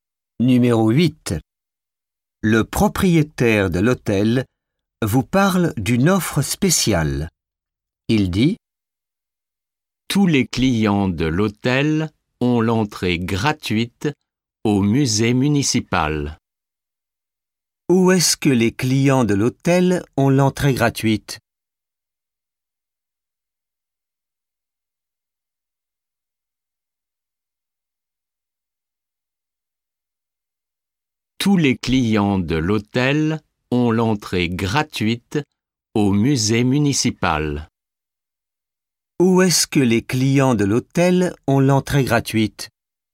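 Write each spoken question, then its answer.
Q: Où est-ce que les clients de l'hôtel ont l'entrée gratuite ?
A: Au musée municipal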